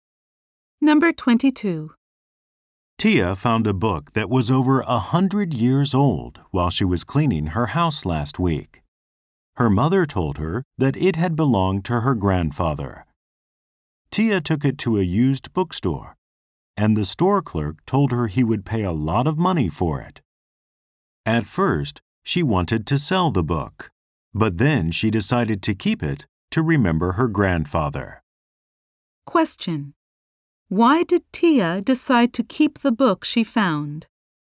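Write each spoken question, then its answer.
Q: Why did Tia decide to keep the book she found?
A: To remember her grandfather.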